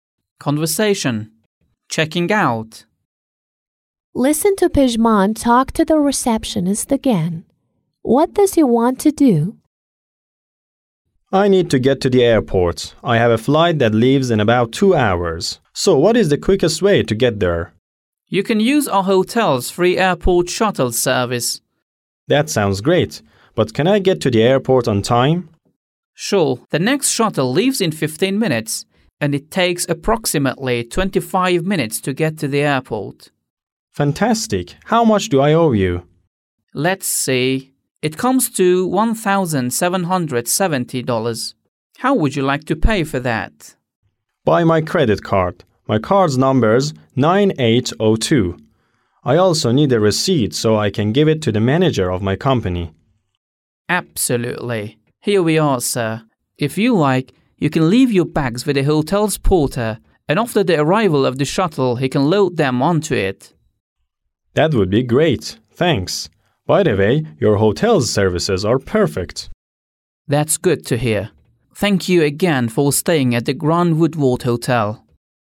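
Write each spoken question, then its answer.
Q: What does he want to do?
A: Check out and get to the airport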